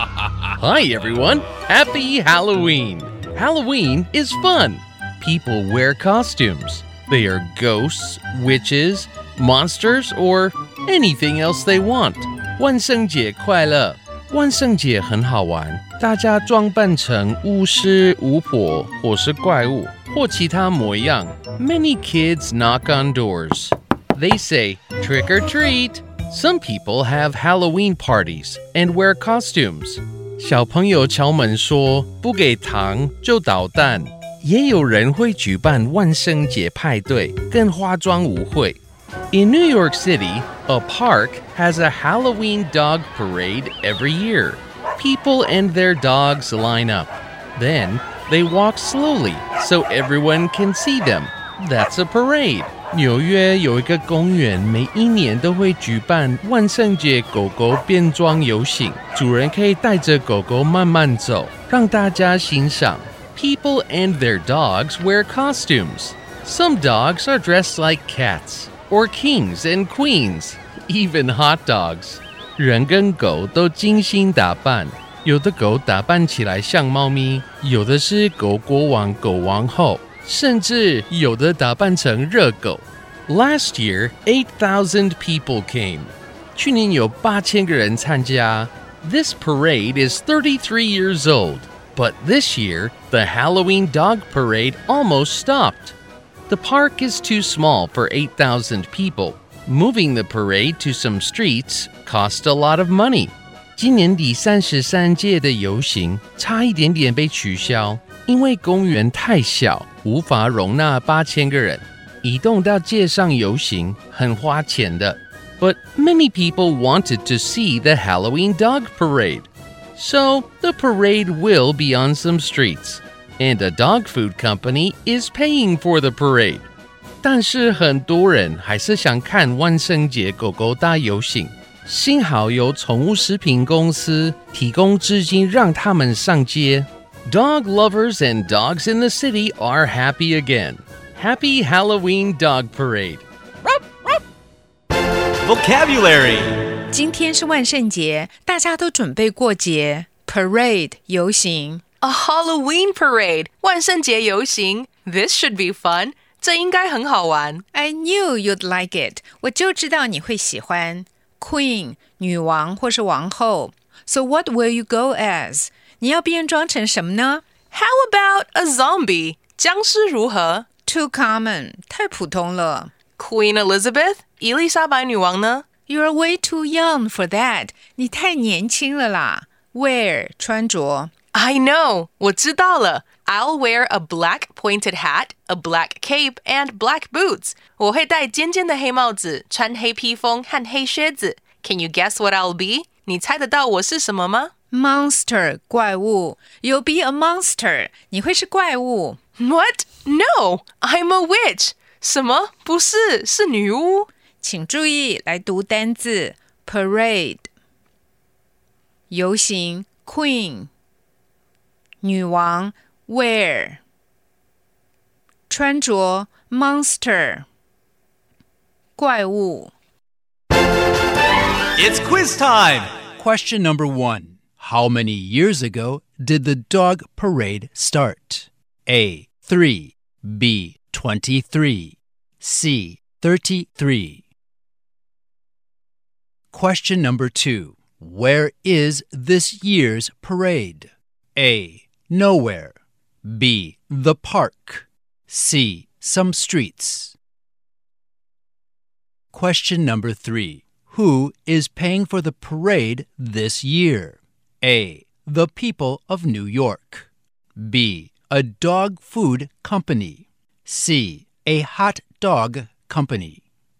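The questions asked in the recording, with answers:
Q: How many years ago did the dog parade start?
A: C: 33

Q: Where is this year's parade?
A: C: Some streets.

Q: Who is paying for the parade this year?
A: B: A dog food company.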